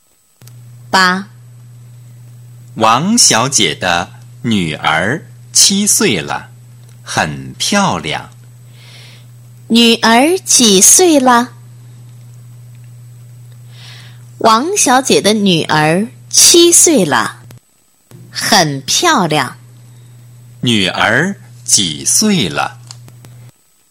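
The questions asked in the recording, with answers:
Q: 女儿几岁了?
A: 七岁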